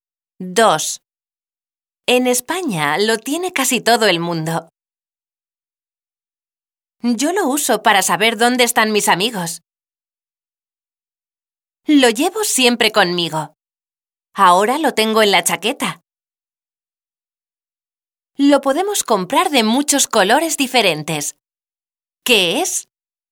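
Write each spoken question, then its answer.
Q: ¿Qué es?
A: el teléfono móvil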